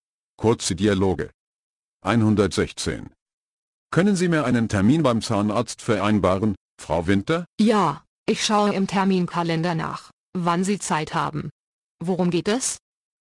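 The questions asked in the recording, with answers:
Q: Worum geht es?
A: Um einen Termin beim Zahnarzt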